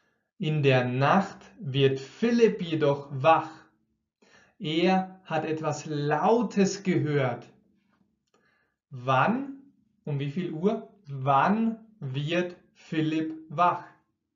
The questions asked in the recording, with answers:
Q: Wann, um wie viel Uhr, wann wird Philipp wach?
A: In der Nacht. Er wird in der Nacht wach.